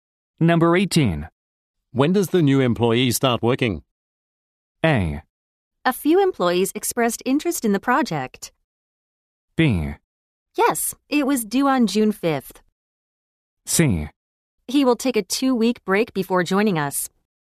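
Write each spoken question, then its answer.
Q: When does the new employee start working?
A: C: He will take a two week break before joining us.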